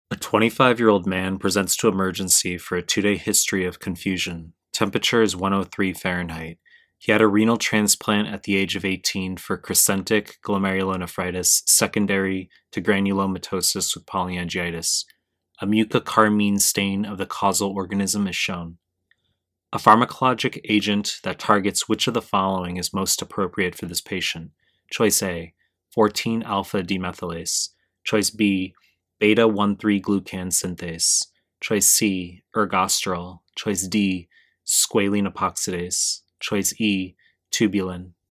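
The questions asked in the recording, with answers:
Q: A pharmacologic agent that targets which of the following is most appropriate for this patient?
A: C: ergosterol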